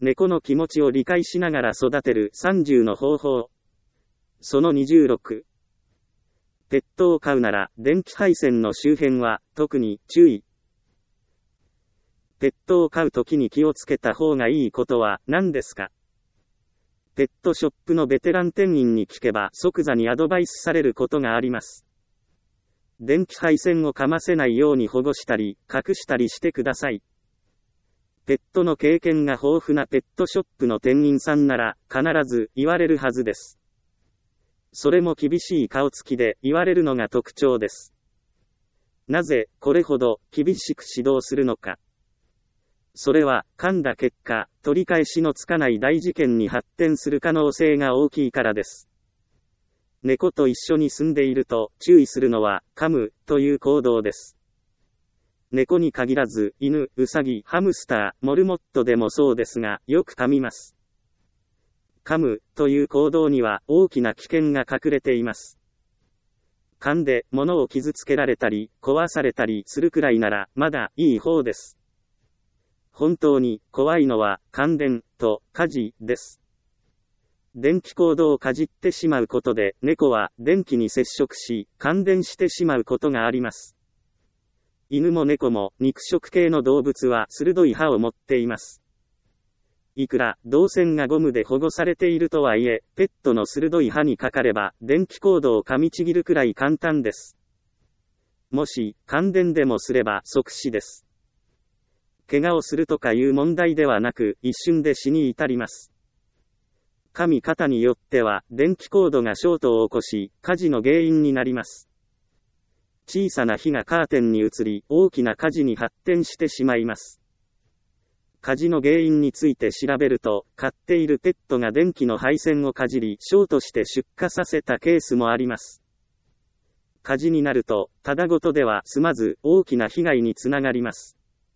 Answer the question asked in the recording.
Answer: ペットを飼うときに一番気をつけなければいけないのは、電気配線をかませないこと。